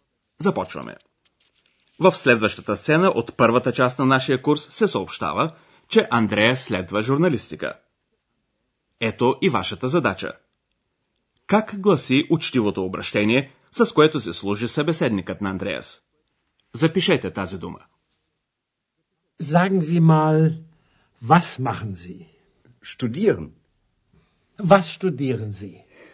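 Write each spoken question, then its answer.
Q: Как гласи учтивото обращение, с което се служи събеседникът на Андреас?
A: Sie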